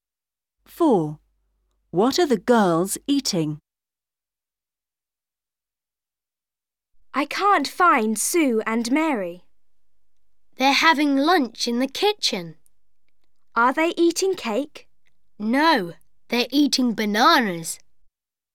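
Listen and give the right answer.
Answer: Bananas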